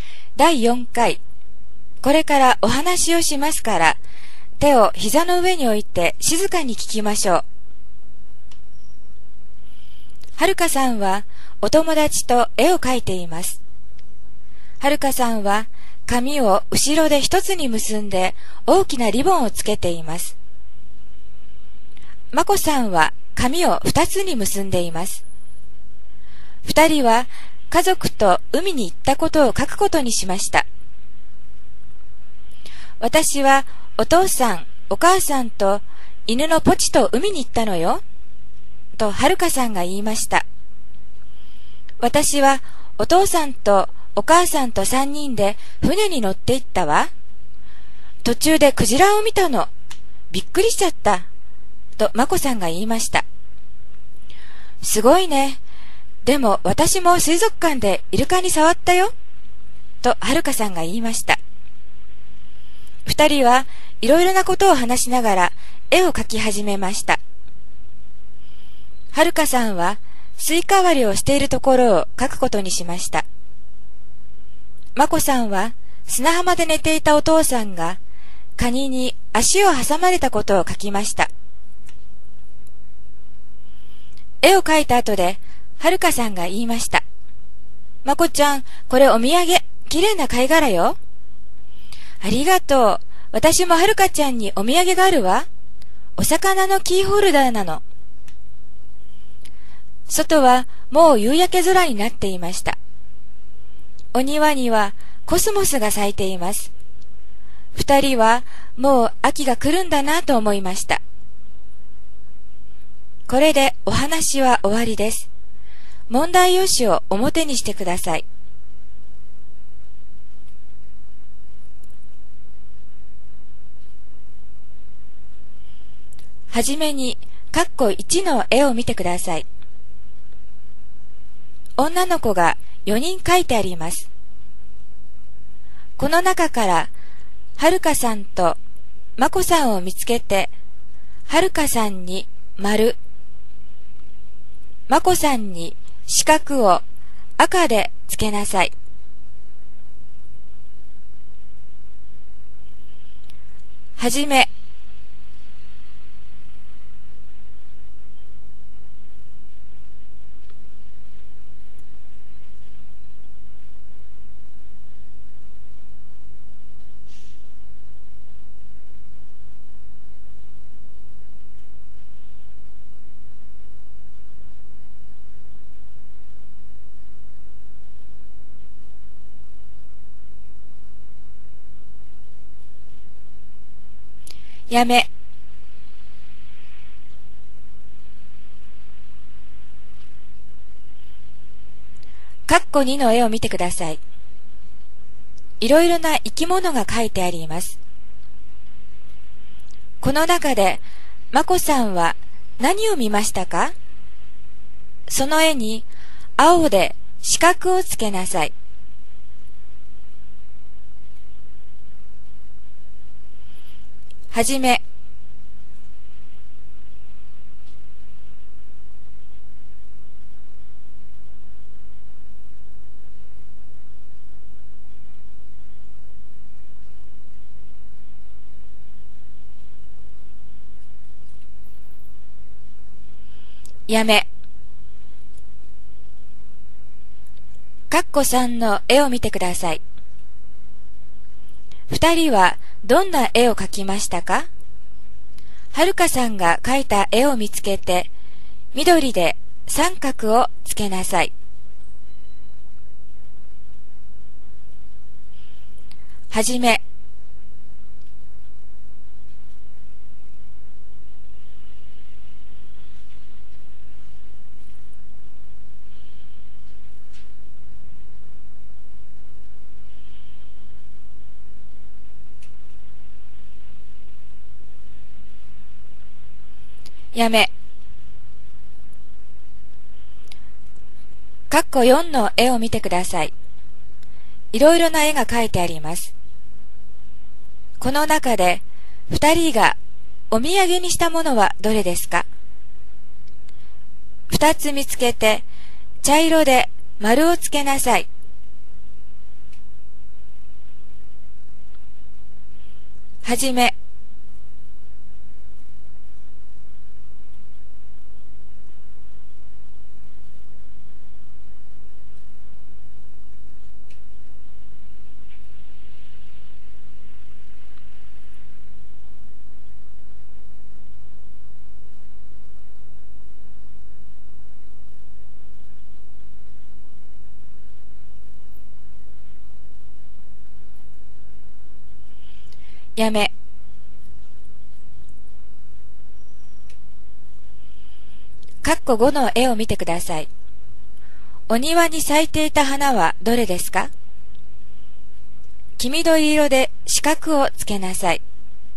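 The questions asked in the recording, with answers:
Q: この中で、まこさんは何を見ましたか?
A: クジラ

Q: 二人はどんな絵を描きましたか?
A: スイカ割りをしているところ

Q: この中で、二人がお土産にしたものはどれですか?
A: 貝殻とお魚のキーホルダー

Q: お庭に咲いていた花はどれですか?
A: コスモス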